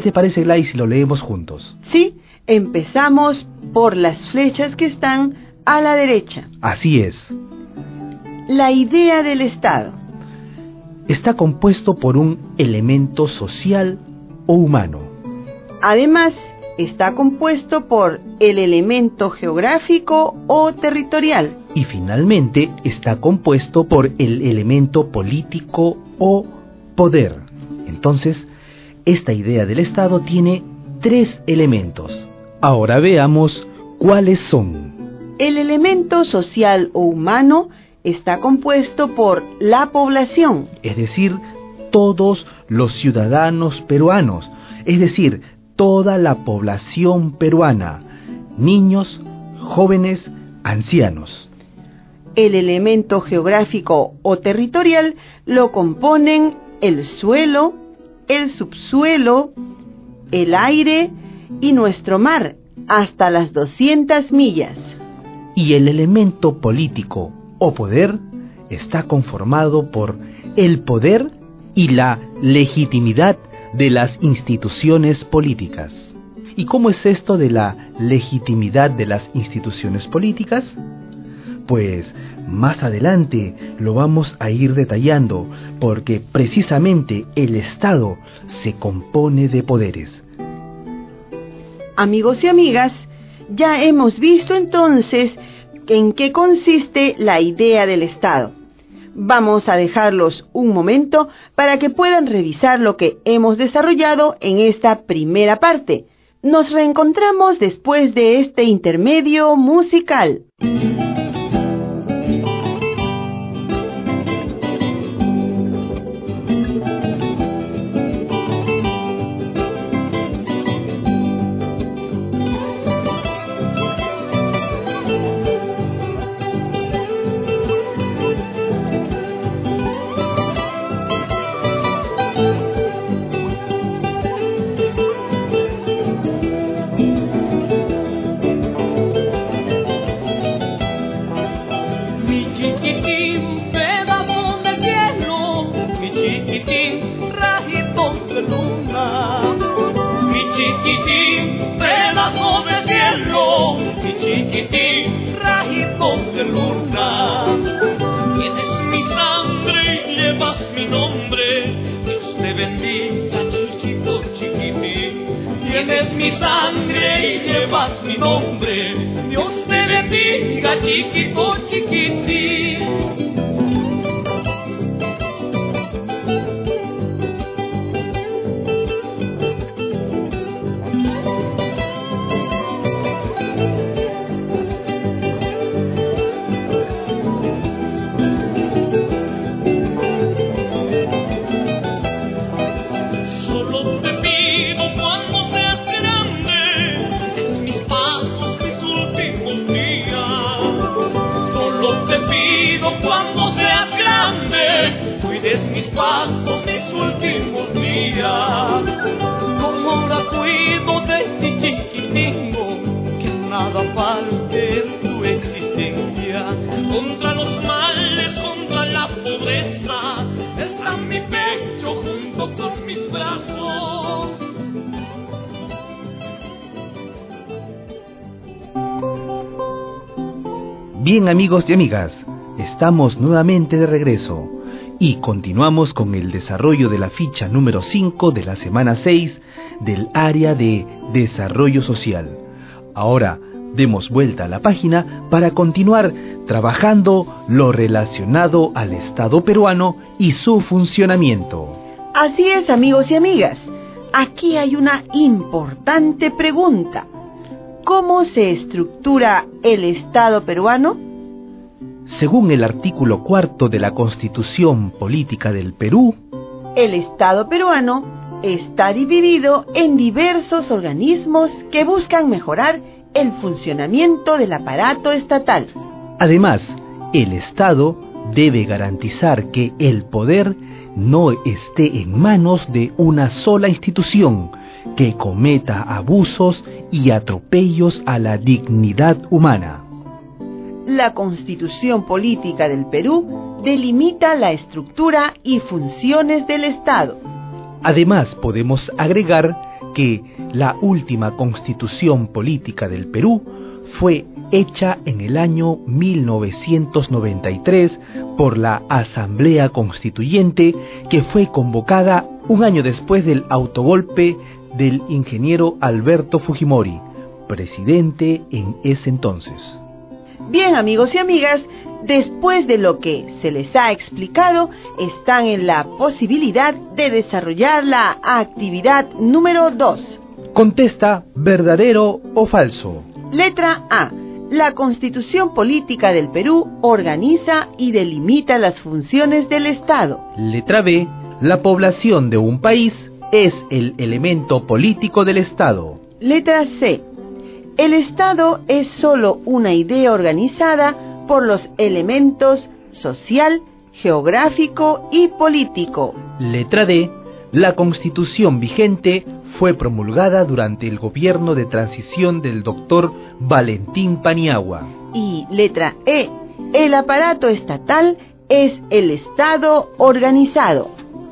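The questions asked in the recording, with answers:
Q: Letra A. La Constitución Política del Perú organiza y delimita las funciones del Estado.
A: Verdadero

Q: Letra B. La población de un país es el elemento político del Estado.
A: Falso (es el elemento social o humano)

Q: Letra D. La Constitución vigente fue promulgada durante el gobierno de transición del doctor Valentín Paniagua.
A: Falso (fue hecha en 1993, durante el gobierno de Alberto Fujimori)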